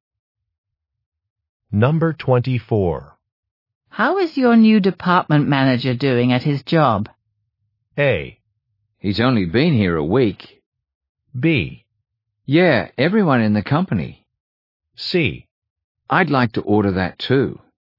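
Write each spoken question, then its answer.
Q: How is your new department manager doing at his job?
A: A: He's only been here a week.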